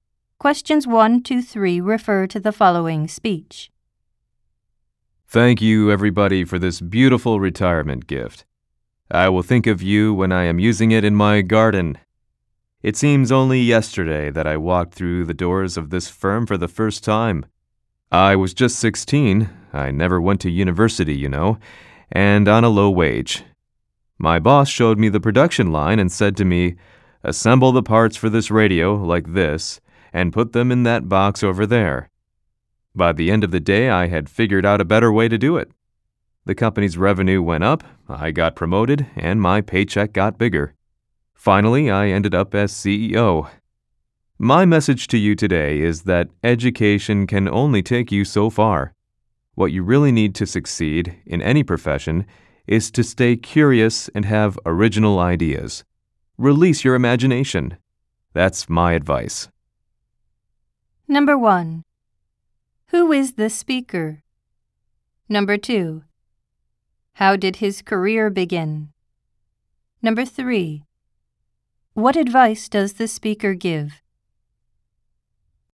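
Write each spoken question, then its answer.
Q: Who is the speaker?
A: A retiring CEO of the company

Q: How did his career begin?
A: He started at 16 assembling radio parts on the production line for a low wage

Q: What advice does the speaker give?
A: Stay curious, have original ideas and use your imagination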